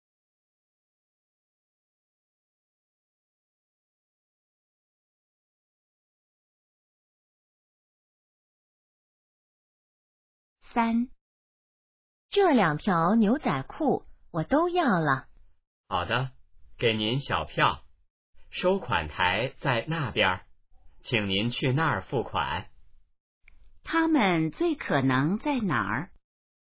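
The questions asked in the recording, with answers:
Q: 他们最可能在哪儿?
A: 商店(服装店)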